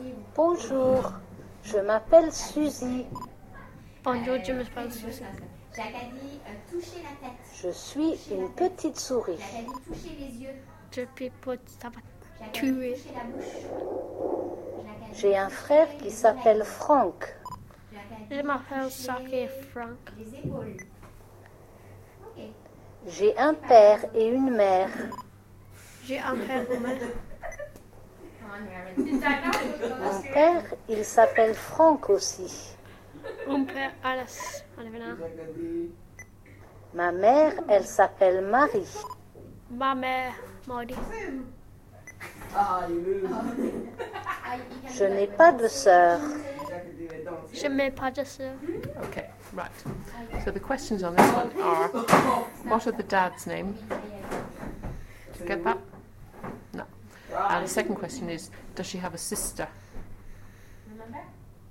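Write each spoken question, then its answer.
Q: what are the dad's name?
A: Franck

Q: does she have a sister?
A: No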